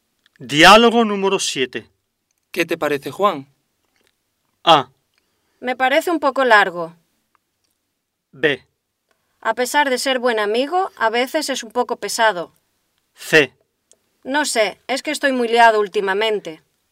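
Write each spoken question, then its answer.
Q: ¿Qué te parece, Juan?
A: B: A pesar de ser buen amigo, a veces es un poco pesado.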